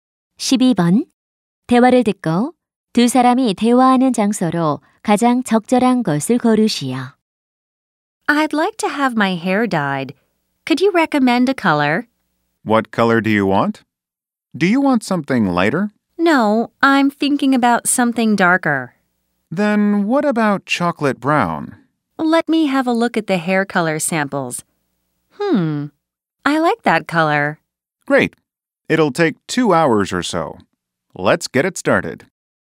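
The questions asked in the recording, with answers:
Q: 대화를 듣고 두 사람이 대화하는 장소로 가장 적절한 것을 고르시오.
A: 미용실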